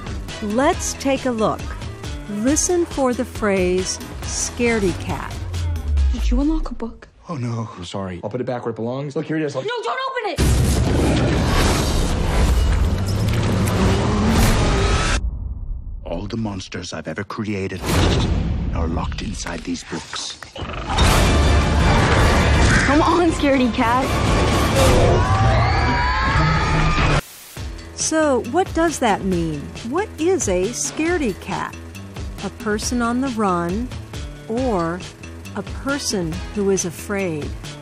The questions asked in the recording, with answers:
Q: What is a scaredy cat?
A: A scaredy cat is a person who is very afraid.